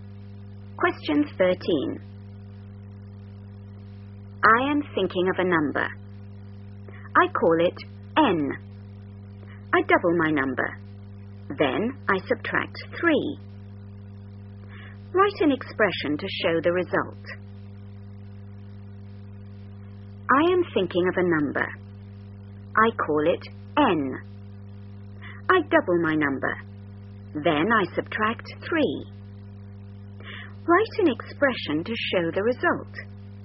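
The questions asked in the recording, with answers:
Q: Then I subtract 3. Write an expression to show the result.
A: 2N - 3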